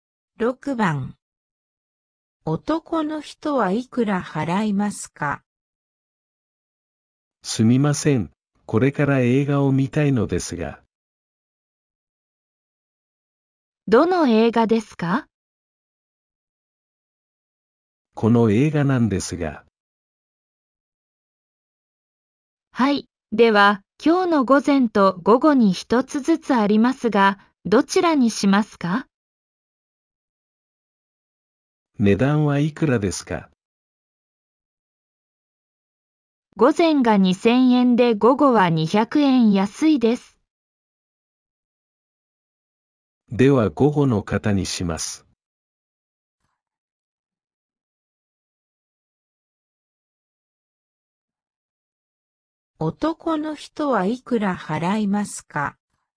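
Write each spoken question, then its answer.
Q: 男の人はいくら払いますか?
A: 1800円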